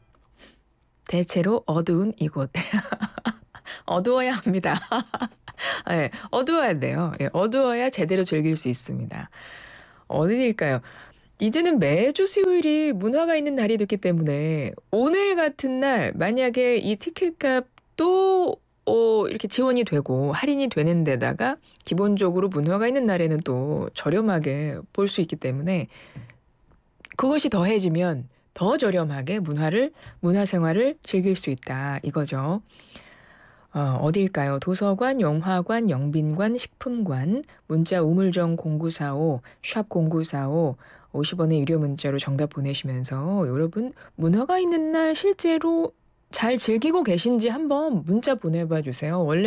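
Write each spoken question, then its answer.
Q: 어디일까요? 도서관, 영화관, 영빈관, 식품관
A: 영화관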